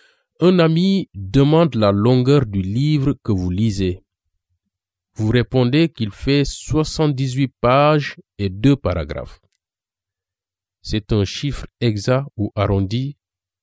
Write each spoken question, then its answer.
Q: C'est un chiffre exact ou arrondi?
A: Ça a l'air très exact.